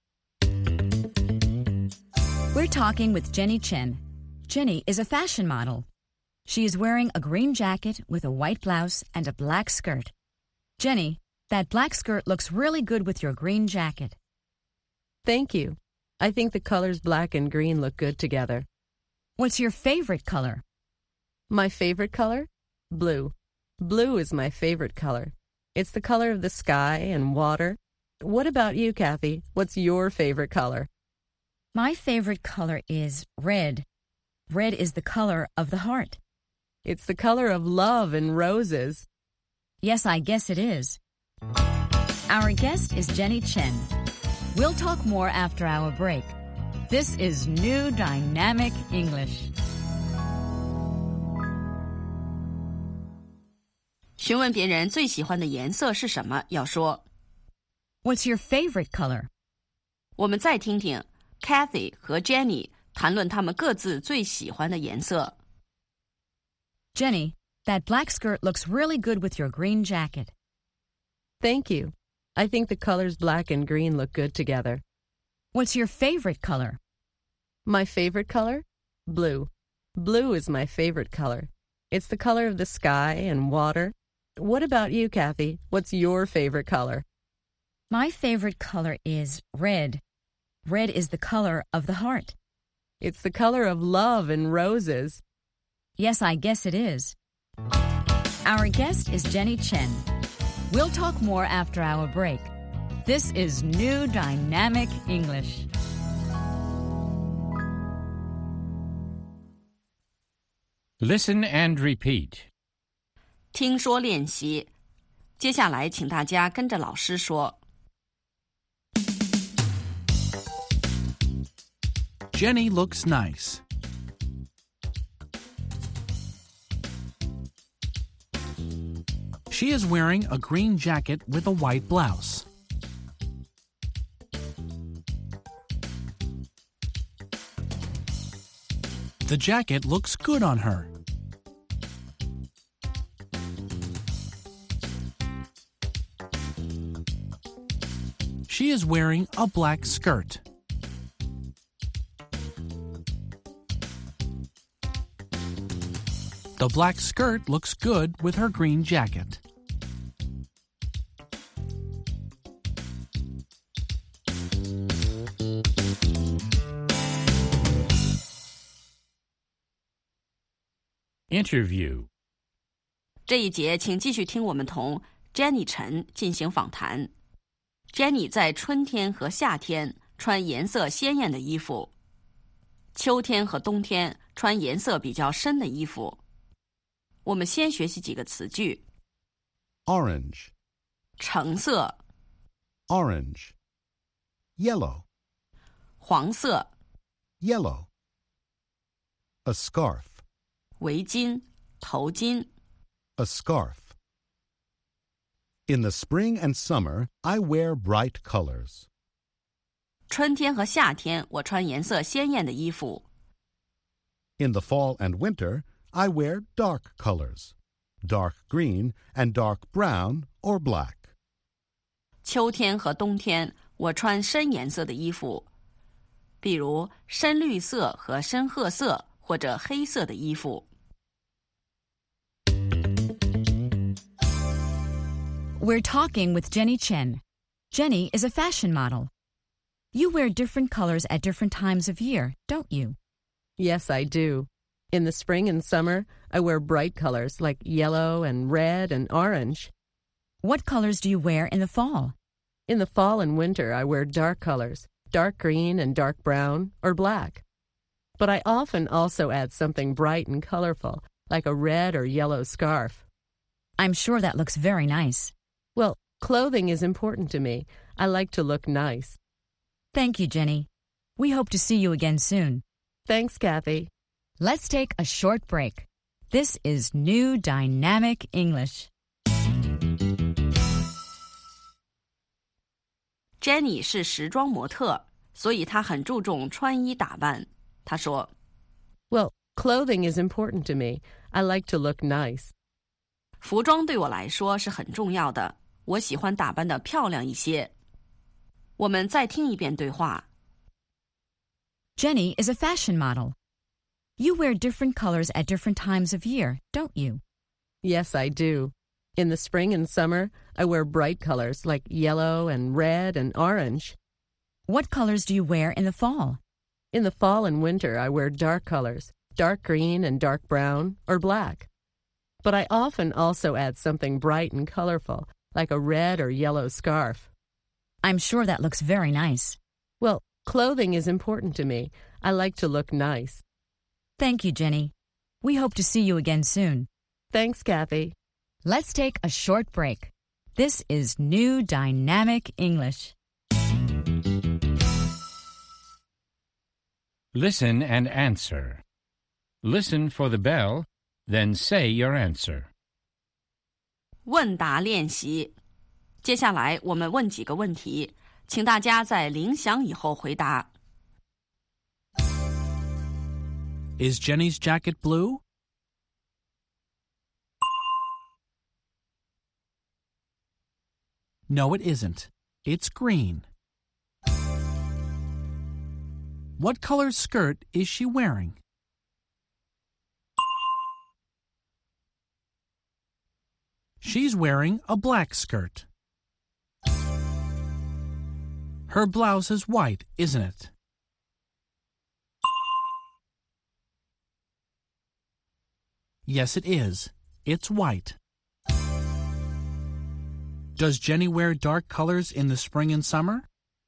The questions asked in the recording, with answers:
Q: Is Jenny's jacket blue?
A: No, it isn't. It's green.

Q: What color skirt is she wearing?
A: She's wearing a black skirt.

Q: Does Jenny wear dark colors in the spring and summer?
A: No, she doesn't. In the spring and summer, she wears bright colors.